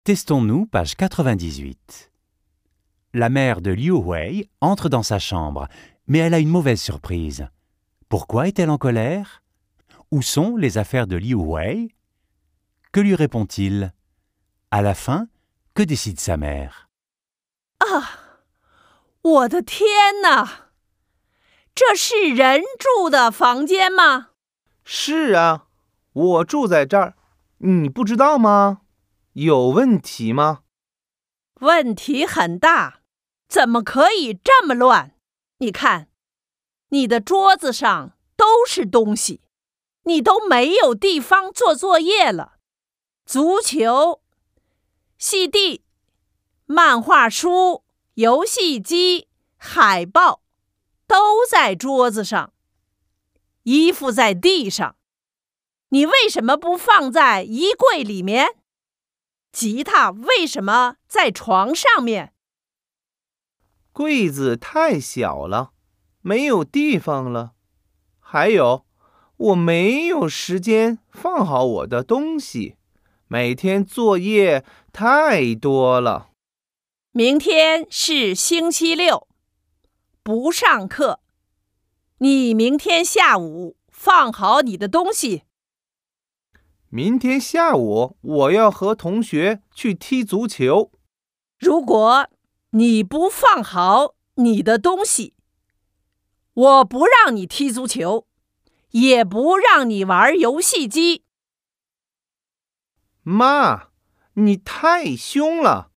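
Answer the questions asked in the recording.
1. Parce que la chambre est très en désordre
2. Sur le bureau (ballon, BD, console, posters), les vêtements par terre, la guitare sur le lit
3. L'armoire est trop petite et il n'a pas le temps de ranger, il a trop de devoirs
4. Il doit ranger demain après-midi, sinon pas de foot ni de console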